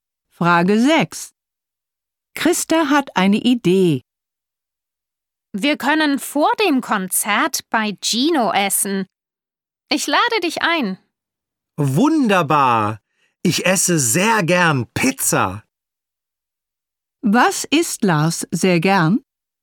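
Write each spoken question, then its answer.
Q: Was isst Lars sehr gern?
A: Pizza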